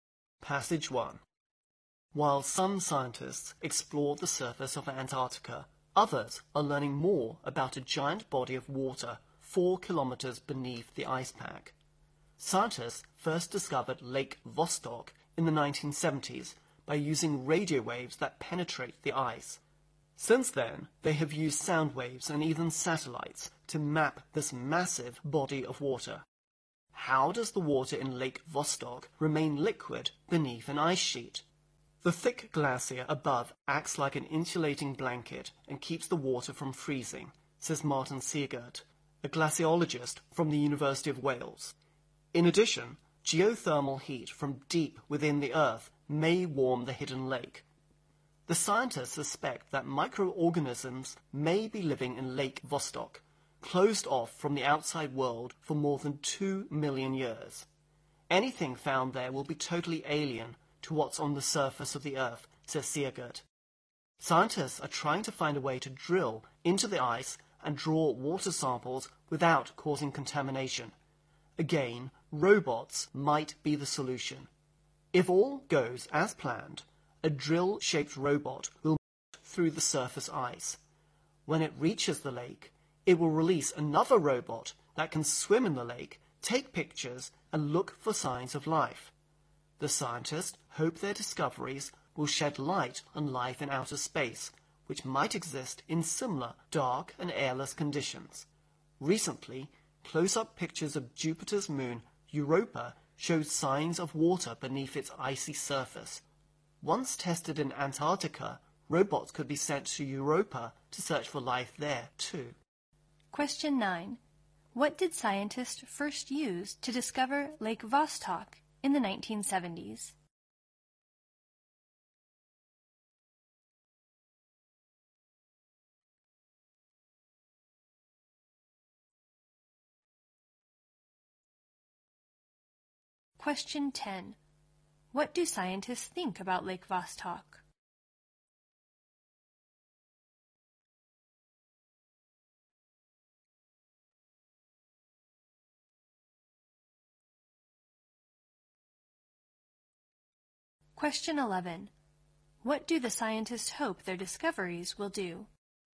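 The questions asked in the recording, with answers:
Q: What did scientists first use to discover Lake Vostok in the 1970s?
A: Radio waves that penetrate the ice

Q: What do the scientists hope their discoveries will do?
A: Shed light on life in outer space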